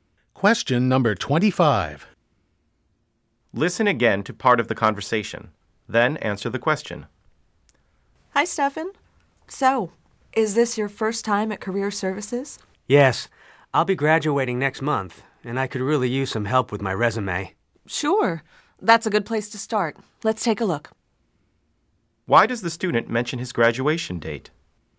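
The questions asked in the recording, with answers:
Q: Why does the student mention his graduation date?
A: To explain why he needs help with his resume now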